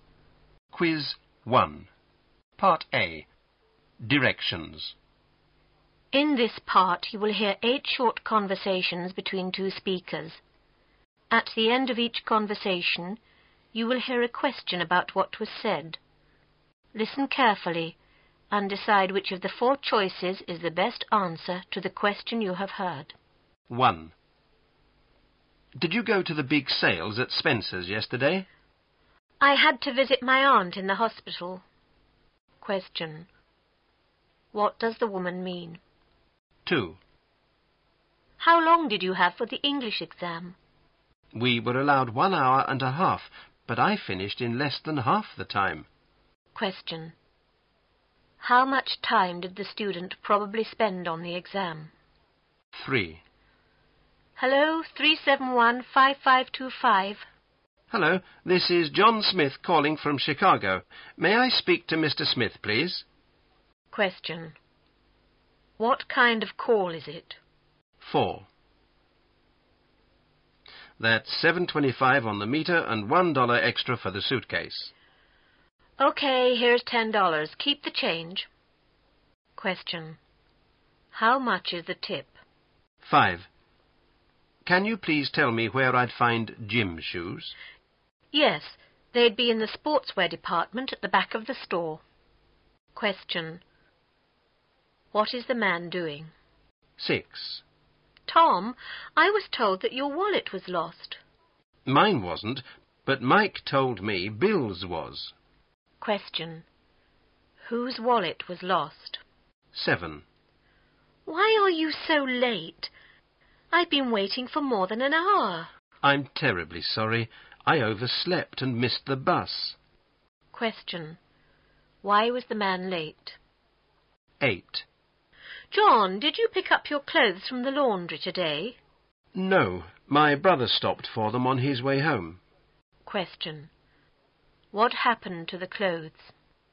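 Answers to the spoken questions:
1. She didn't go to the sale because she had to visit her aunt in the hospital.
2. Less than 45 minutes
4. $1.75
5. Asking where to find gym shoes in a store
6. Bill's
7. He overslept and missed the bus.
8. John's brother picked them up from the laundry.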